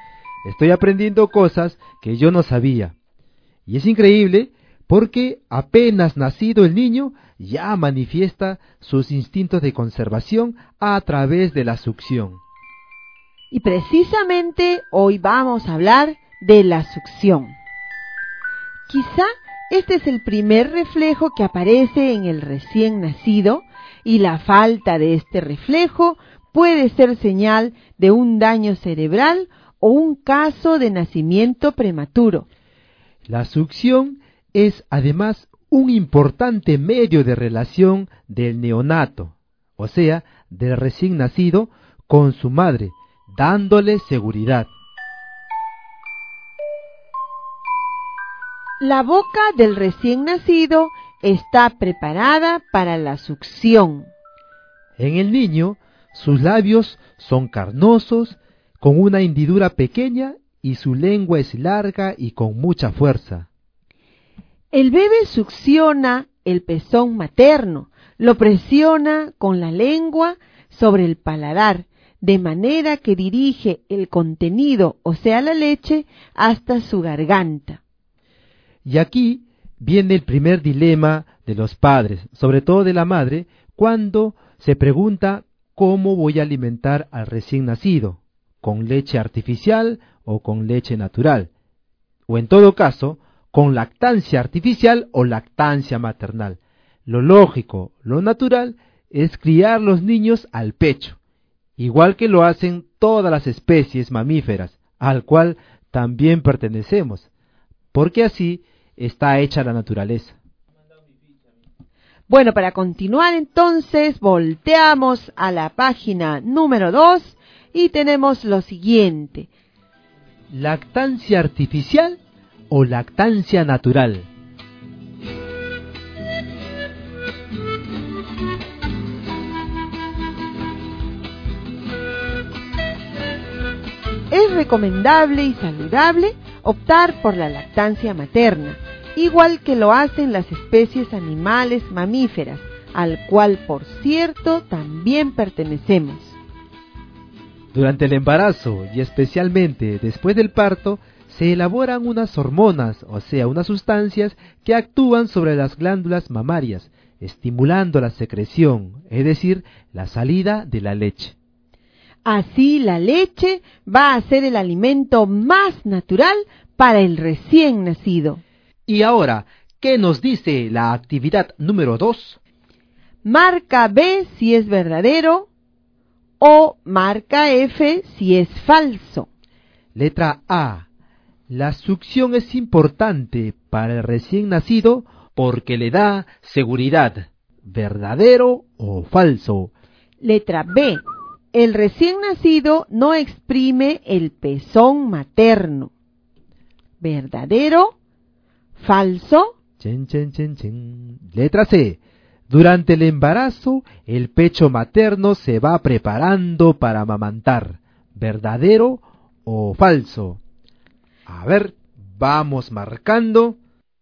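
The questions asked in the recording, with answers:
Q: La succión es importante para el recién nacido porque le da seguridad. ¿Verdadero o falso?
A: Verdadero

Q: El recién nacido no exprime el pezón materno. ¿Verdadero? ¿Falso?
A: Falso

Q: Durante el embarazo, el pecho materno se va preparando para amamantar. ¿Verdadero o falso?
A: Verdadero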